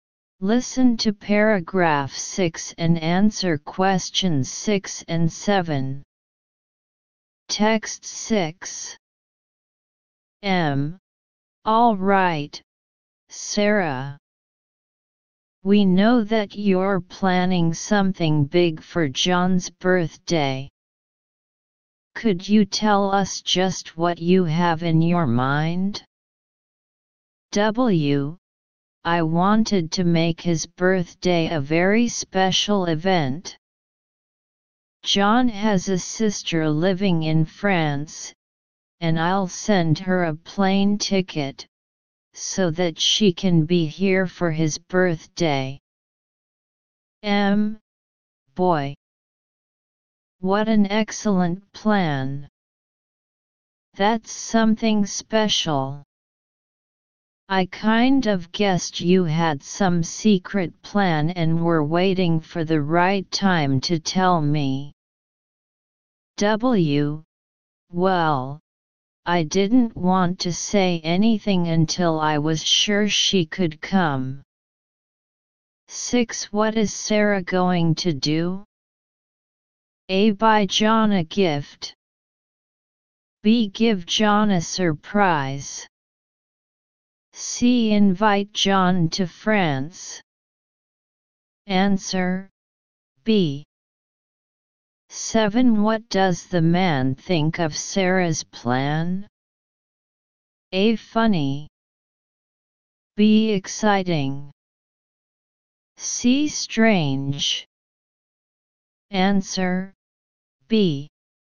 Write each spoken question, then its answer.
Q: What is Sarah going to do?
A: Answer B.

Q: What does the man think of Sarah's plan?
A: Answer B.